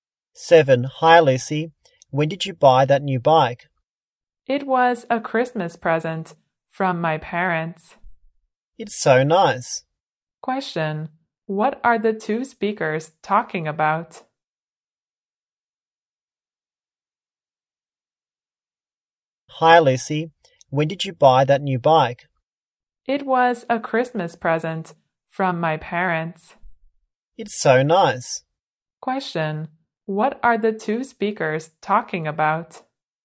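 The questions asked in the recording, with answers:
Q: What are the two speakers talking about?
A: Lucy's new bike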